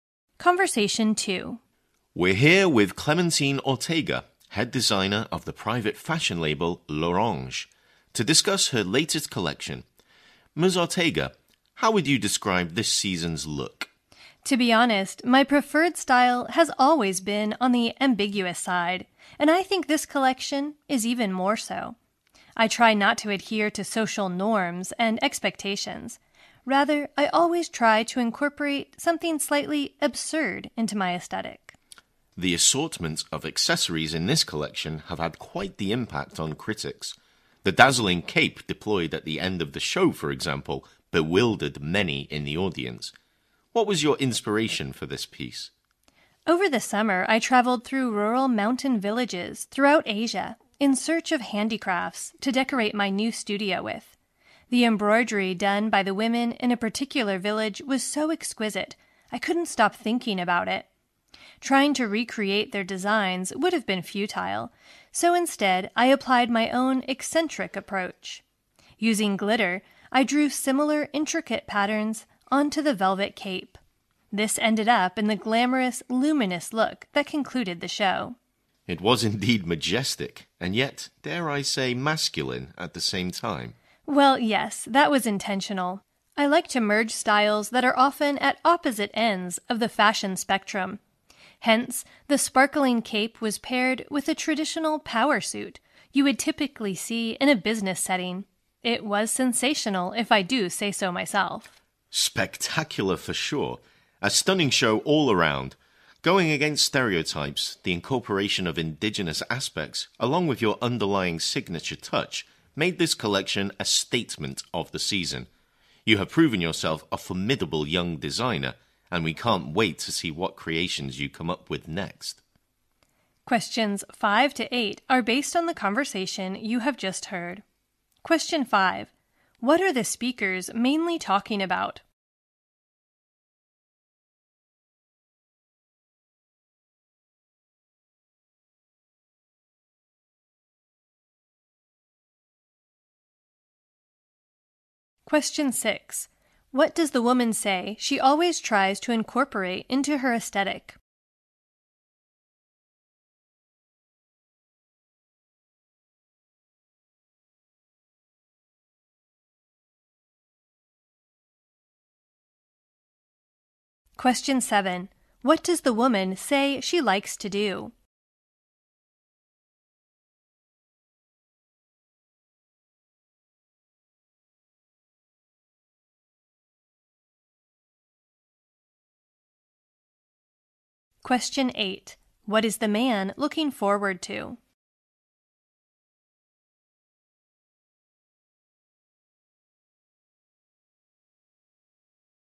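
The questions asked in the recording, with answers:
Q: What are the speakers mainly talking about?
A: The designer's latest fashion collection.

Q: What does the woman say she always tries to incorporate into her aesthetic?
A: Something slightly absurd.

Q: What does the woman say she likes to do?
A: Merge styles from opposite ends of the fashion spectrum.

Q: What is the man looking forward to?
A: The designer's next creations.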